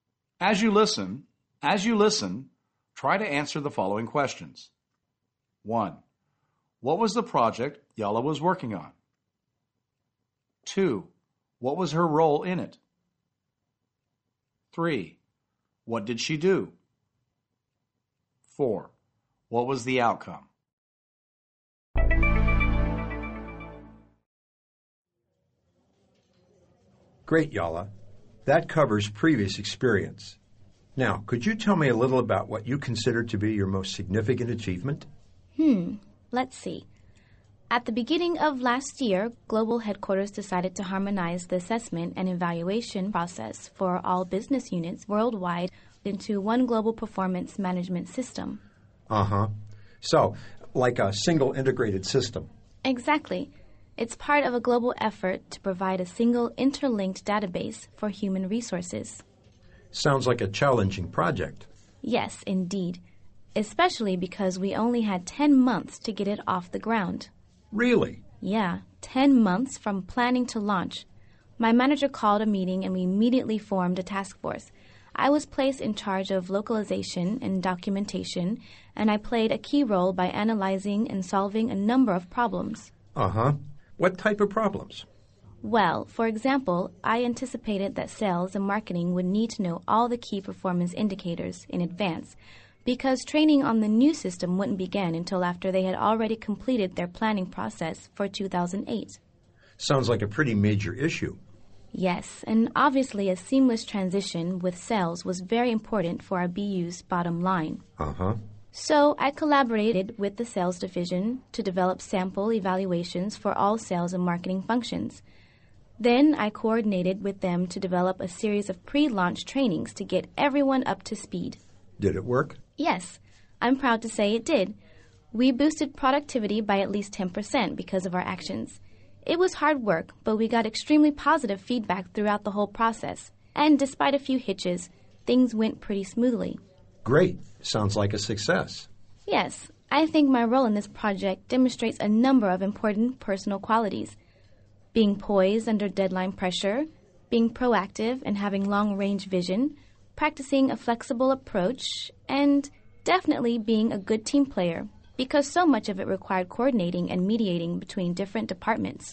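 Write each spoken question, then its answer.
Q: What was the project Yala was working on?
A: Bringing all business units worldwide into one global performance management system

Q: What was her role in it?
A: She was in charge of localization and documentation

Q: What did she do?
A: She worked with the sales division to develop sample evaluations and pre-launch trainings

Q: What was the outcome?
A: Productivity rose by at least 10% and feedback was very positive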